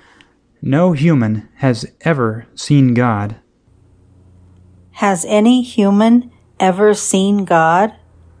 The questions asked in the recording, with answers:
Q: Has any human ever seen God?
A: Humans have never seen God.